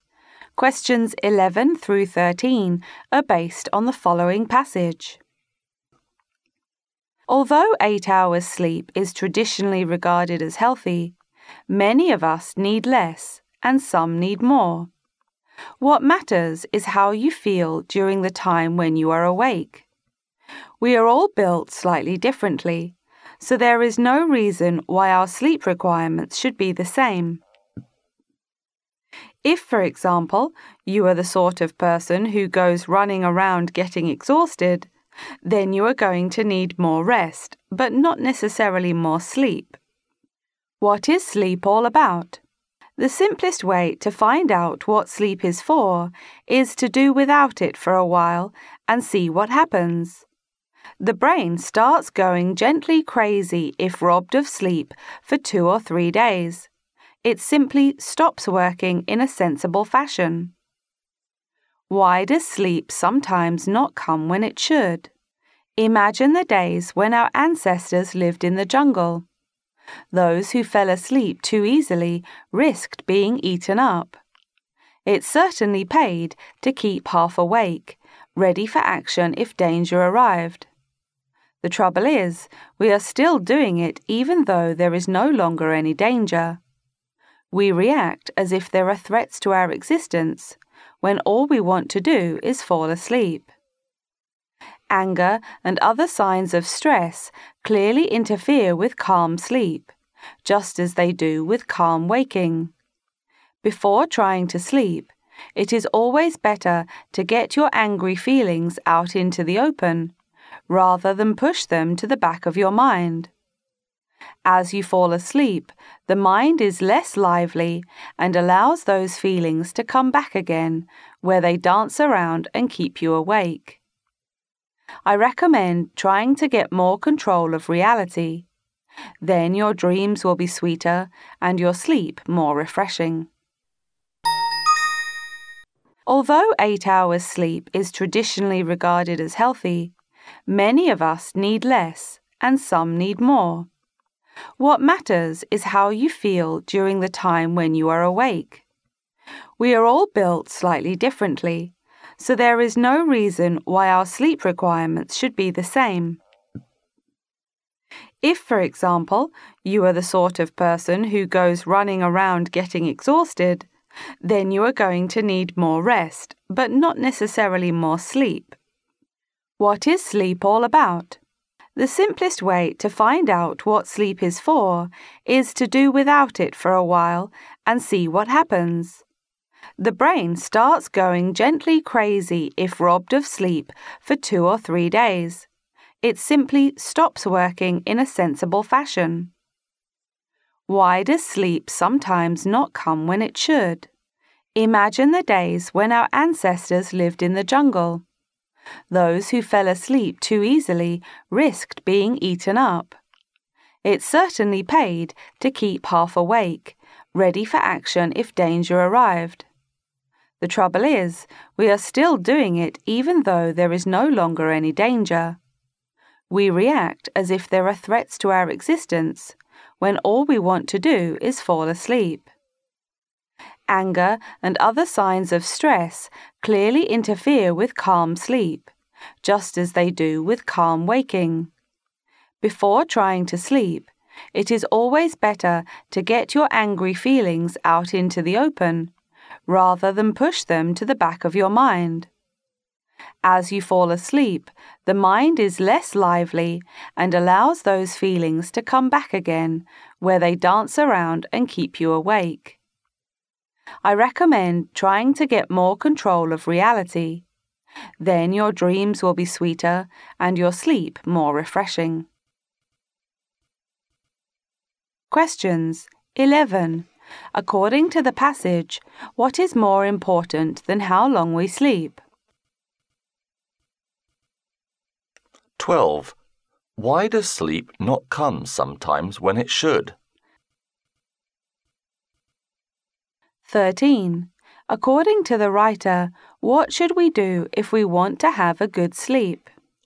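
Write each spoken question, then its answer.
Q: According to the passage, what is more important than how long we sleep?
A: How you feel while you are awake

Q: Why does sleep not come sometimes when it should?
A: Like our ancestors, we stay half awake as if facing danger

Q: According to the writer, what should we do if we want to have a good sleep?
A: Get angry feelings out into the open before sleeping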